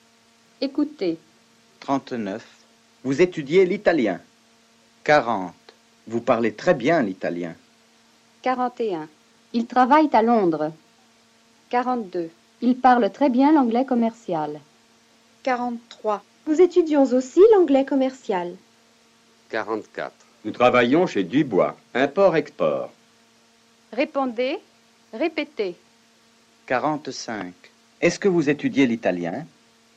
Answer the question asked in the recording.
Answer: Oui, nous étudions l'italien à l'école.